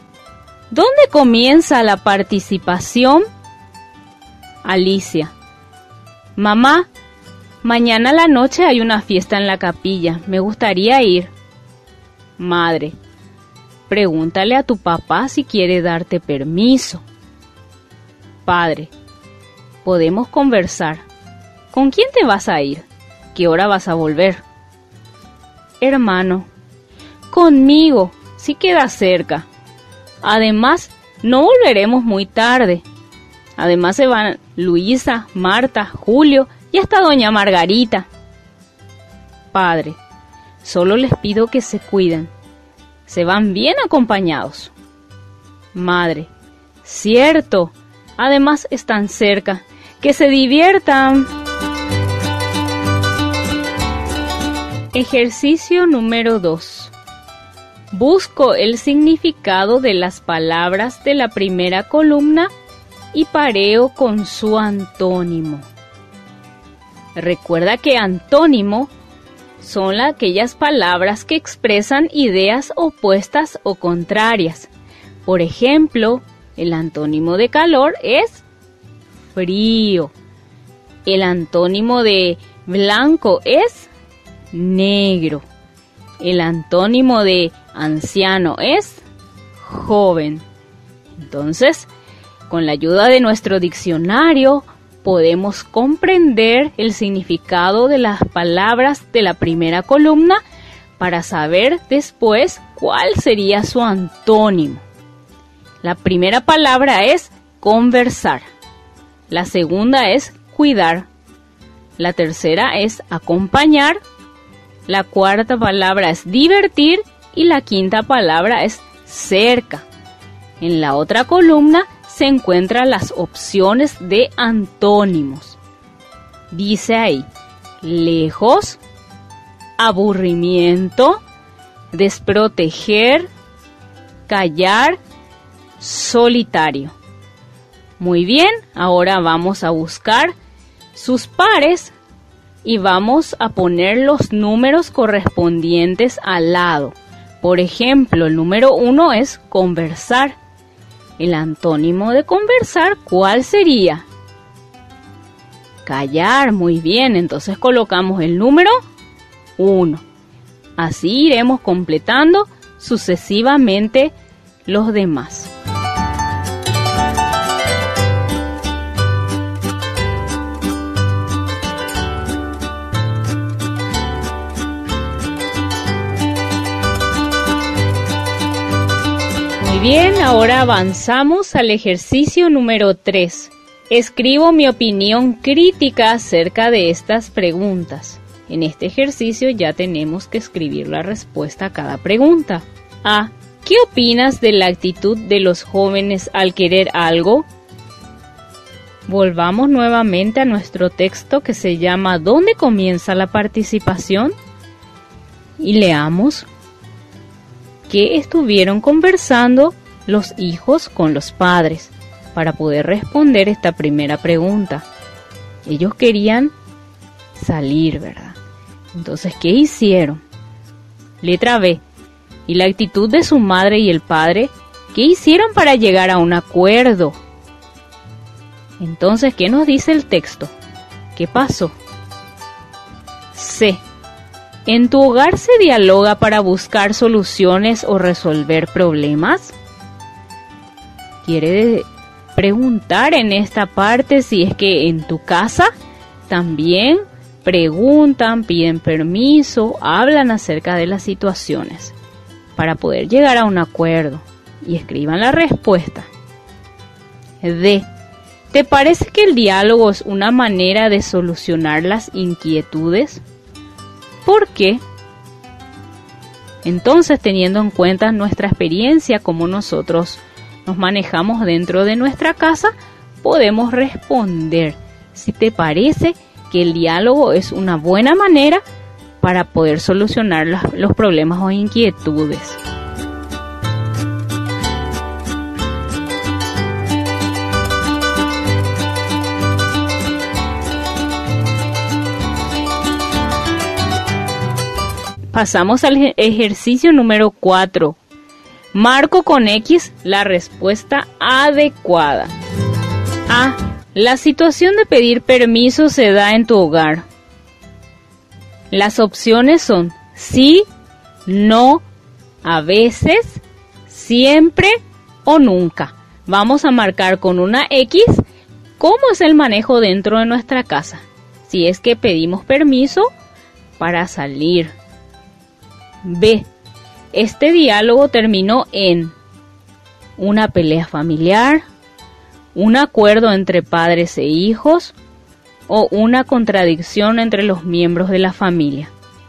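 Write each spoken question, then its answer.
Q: Este diálogo terminó en una pelea familiar, un acuerdo entre padres e hijos o una contradicción entre los miembros de la familia.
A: un acuerdo entre padres e hijos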